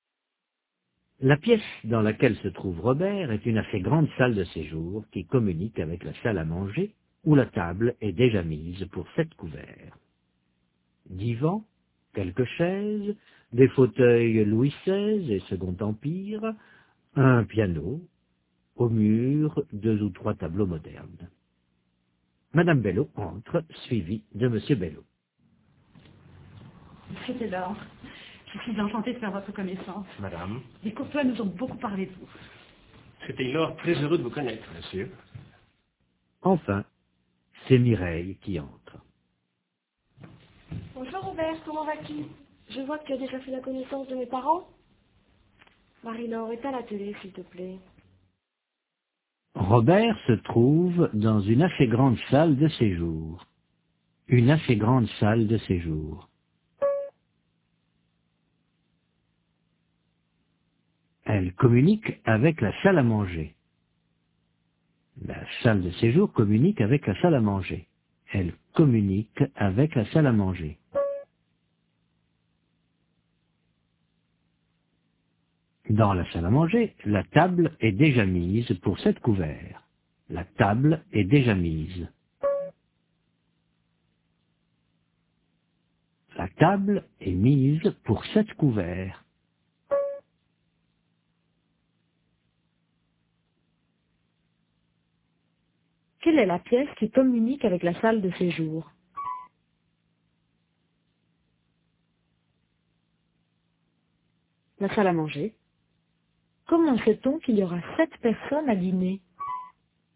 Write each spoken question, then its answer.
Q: Quelle est la pièce qui communique avec la salle de séjour?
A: La salle à manger.

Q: Comment sait-on qu'il y aura 7 personnes à dîner?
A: Parce que la table est mise pour 7 couverts.